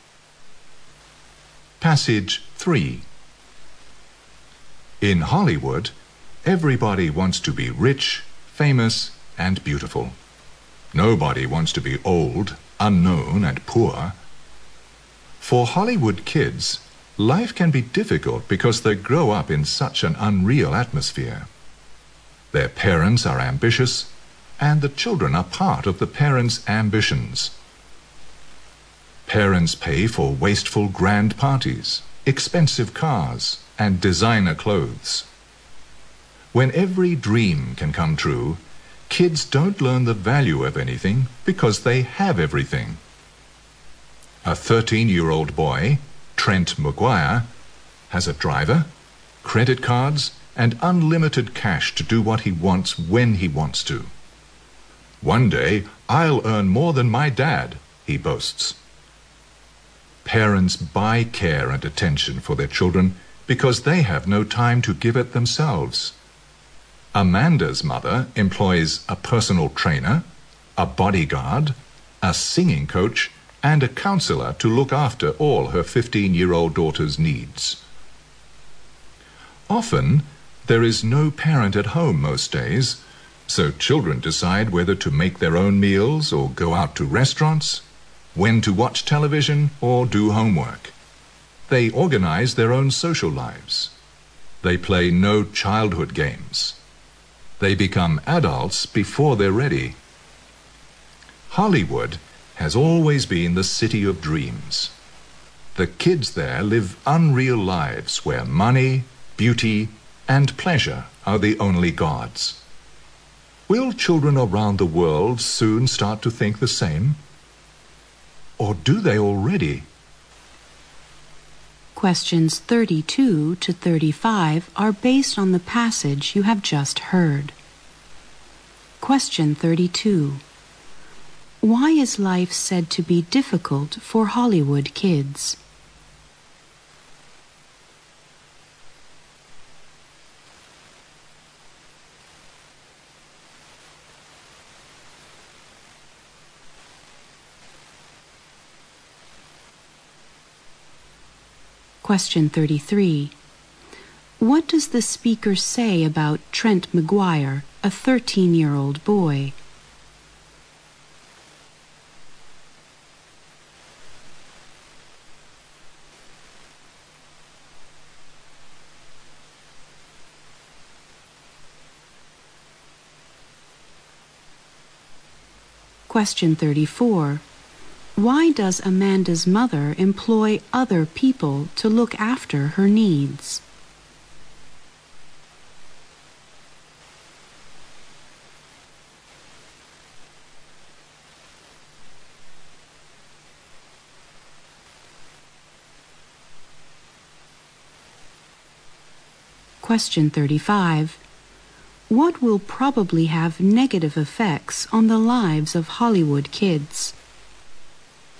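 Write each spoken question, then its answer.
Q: Why is life said to be difficult for Hollywood kids?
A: They grow up in an unreal atmosphere.

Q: What does the speaker say about Trent McGuire, a 13-year-old boy?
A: He has a driver, credit cards and unlimited cash, and boasts he'll earn more than his dad.

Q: Why does Amanda's mother employ other people to look after her needs?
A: She has no time to look after her daughter herself.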